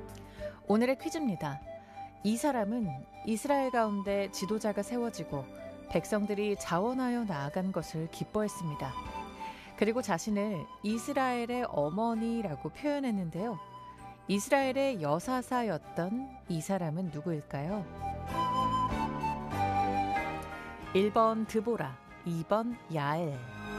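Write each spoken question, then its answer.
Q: 이스라엘의 여사사였던 이 사람은 누구일까요?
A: 1번 드보라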